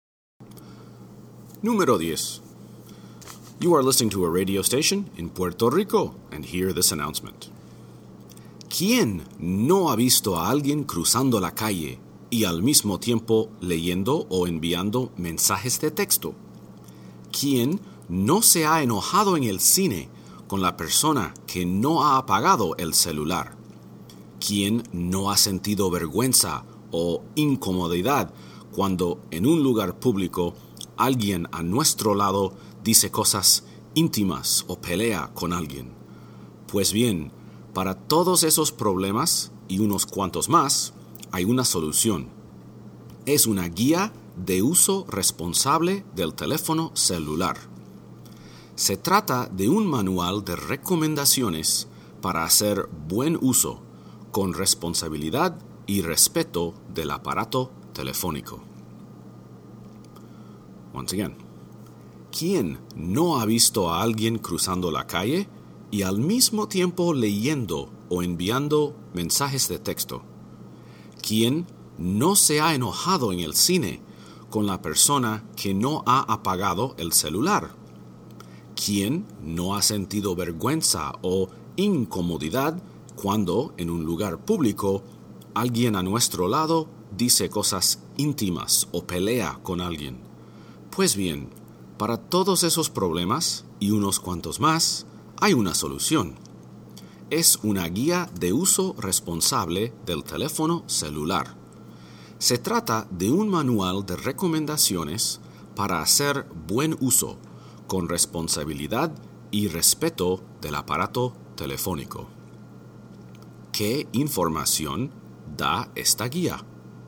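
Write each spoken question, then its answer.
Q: ¿Qué información da esta guía?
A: Recomendaciones para usar el teléfono celular con responsabilidad y respeto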